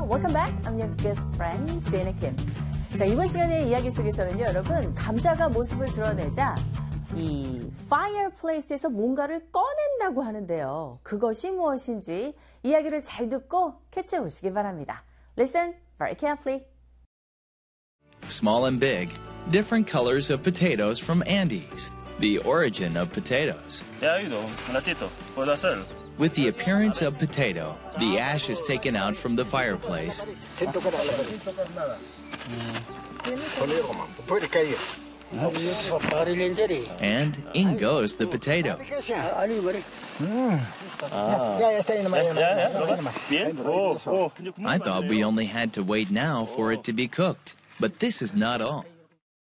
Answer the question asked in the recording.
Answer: 그래서 남은 재들을 꺼내는 모습입니다.